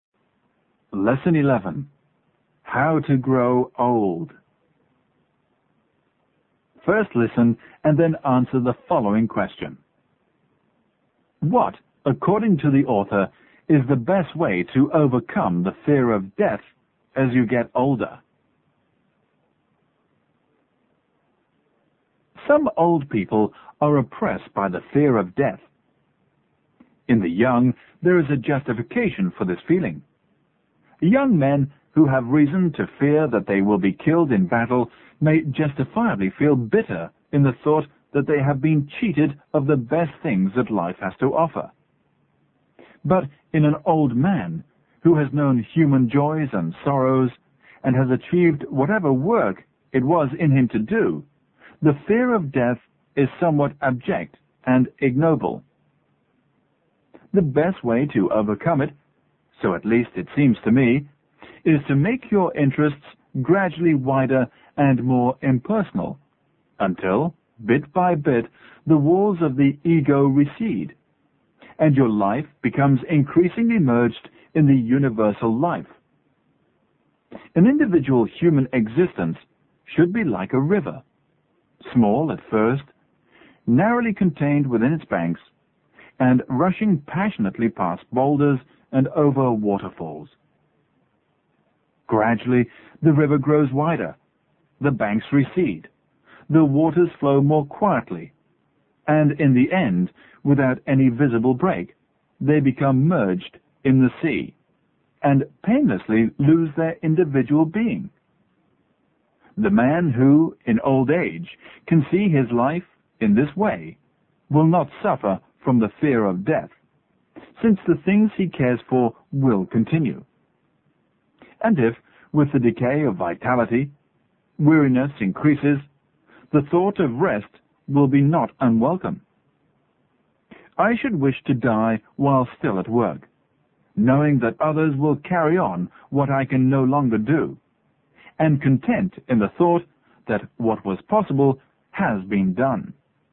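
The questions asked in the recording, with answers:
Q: What, according to the author, is the best way to overcome the fear of death as you get older?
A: Make your interests gradually wider and more impersonal until your life merges in the universal life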